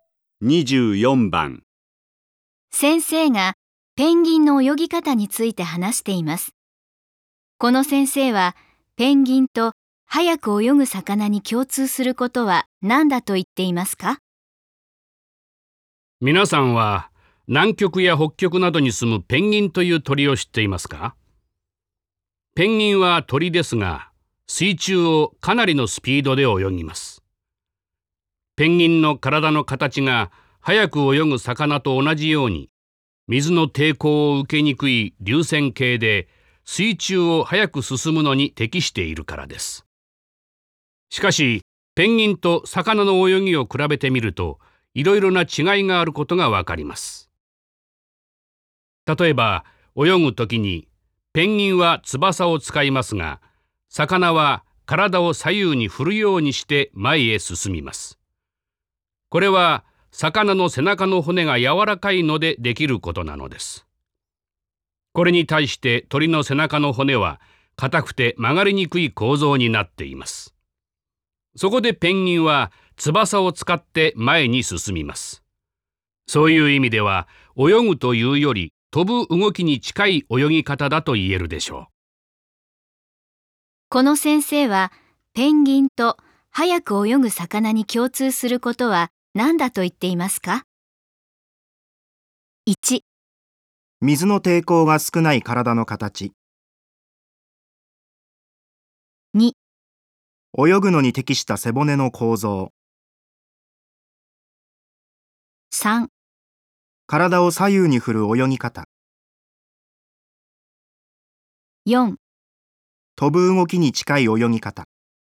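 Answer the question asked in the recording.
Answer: 1: 水の抵抗が少ない体の形。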